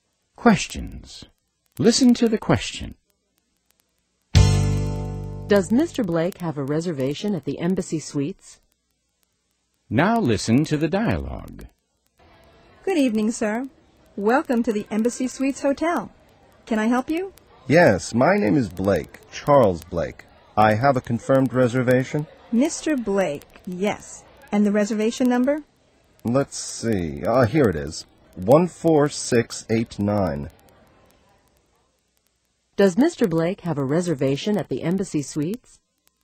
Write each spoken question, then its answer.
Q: Does Mr. Blake have a reservation at the Embassy Suites?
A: Yes, he has a confirmed reservation.